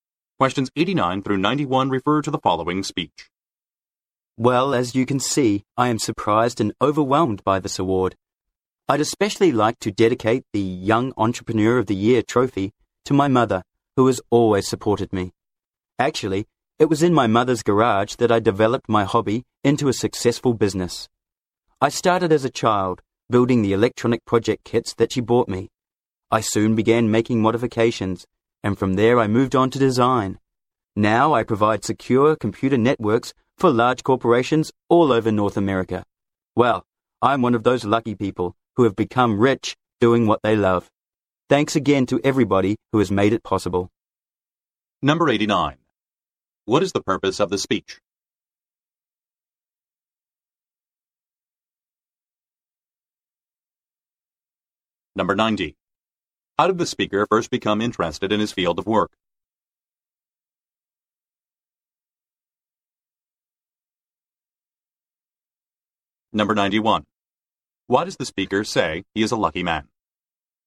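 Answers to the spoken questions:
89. To accept the Young Entrepreneur of the Year award
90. By building electronic project kits his mother bought him as a child
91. He became rich doing what he loves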